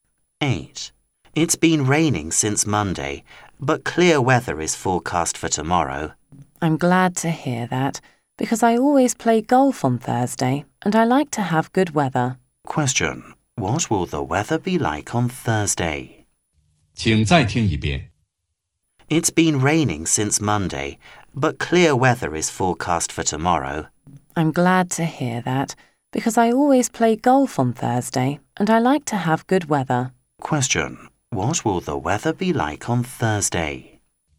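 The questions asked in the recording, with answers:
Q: What will the weather be like on Thursday?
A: Clear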